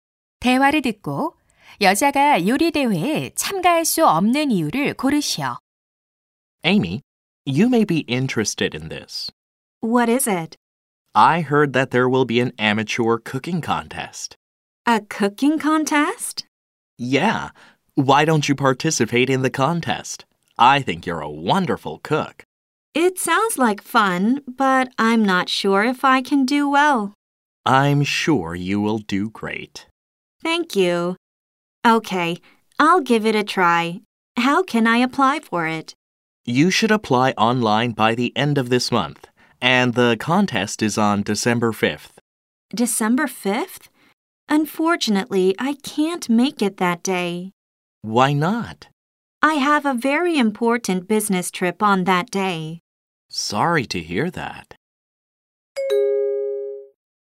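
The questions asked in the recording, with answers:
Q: 대화를 듣고 여자가 요리 대회에 참가할 수 없는 이유를 고르시오.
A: 그날 중요한 출장이 있어서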